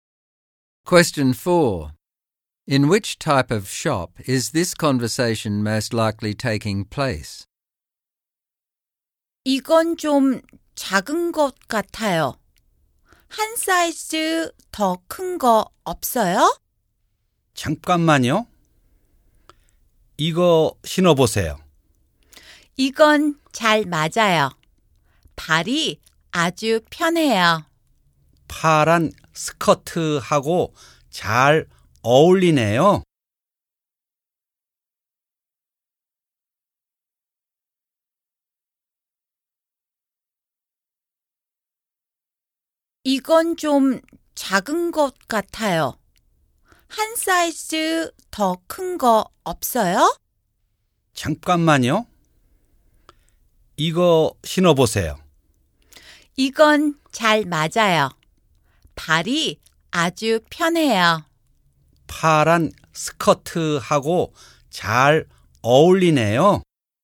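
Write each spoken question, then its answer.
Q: In which type of shop is this conversation most likely taking place?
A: A shoe shop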